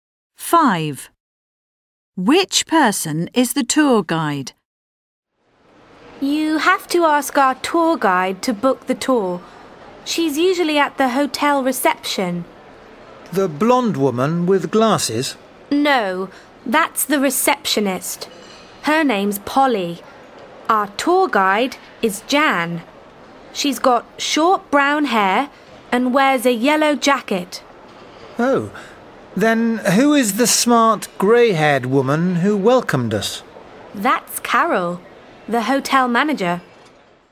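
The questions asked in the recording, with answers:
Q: Which person is the tour guide?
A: Jan, the woman with short brown hair and a yellow jacket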